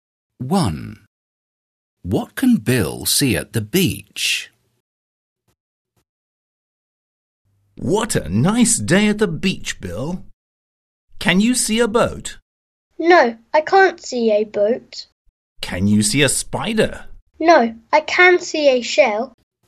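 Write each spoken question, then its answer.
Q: What can Bill see at the beach?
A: A shell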